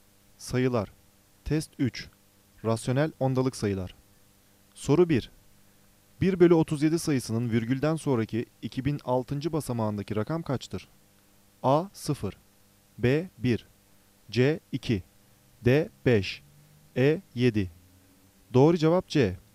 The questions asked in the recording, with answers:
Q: 1 bölü 37 sayısının virgülden sonraki 2006. basamağındaki rakam kaçtır?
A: Doğru cevap C.